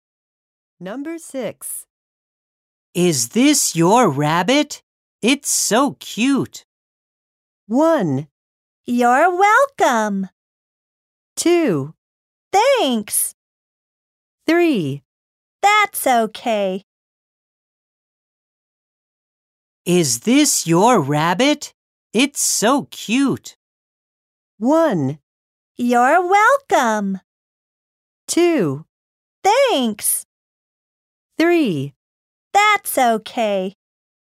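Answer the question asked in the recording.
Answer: 2: Thanks.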